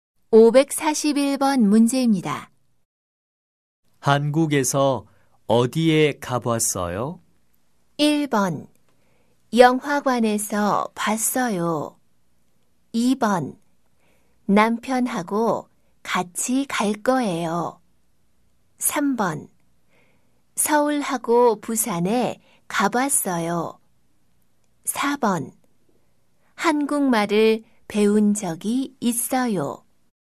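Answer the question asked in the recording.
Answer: 3: 서울하고 부산에 가봤어요.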